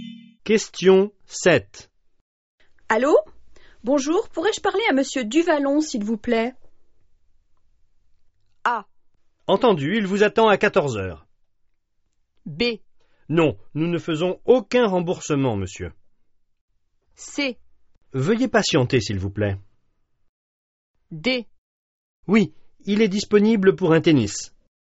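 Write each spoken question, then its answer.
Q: Allô? Bonjour, pourrais-je parler à Monsieur Duvallon, s'il vous plaît?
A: C: Veuillez patienter, s'il vous plaît.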